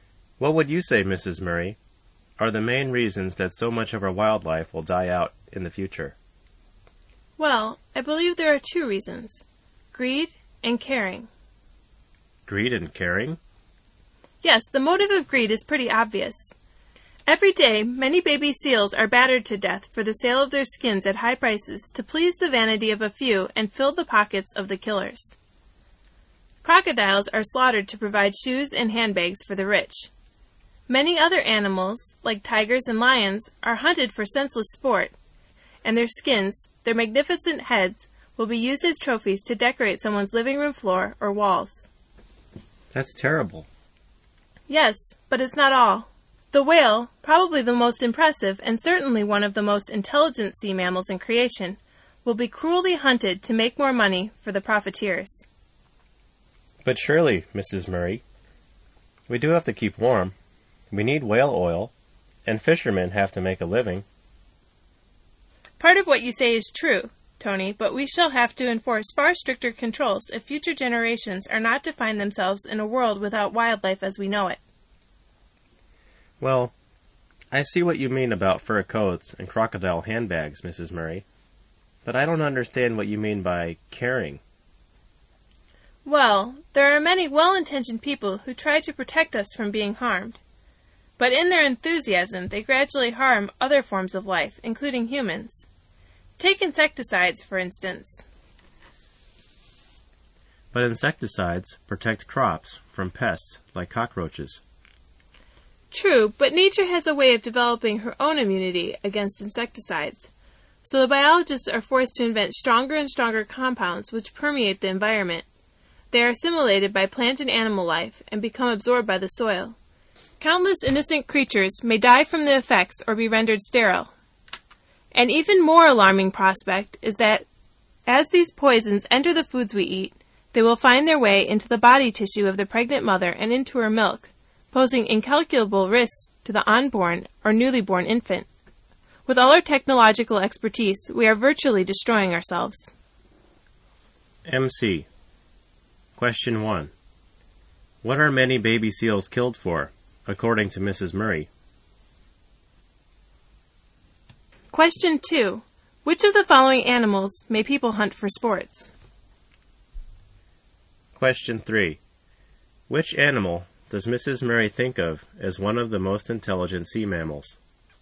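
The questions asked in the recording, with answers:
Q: What are many baby seals killed for, according to Mrs. Murray?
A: For the sale of their skins at high prices

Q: Which animal does Mrs. Murray think of as one of the most intelligent sea mammals?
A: The whale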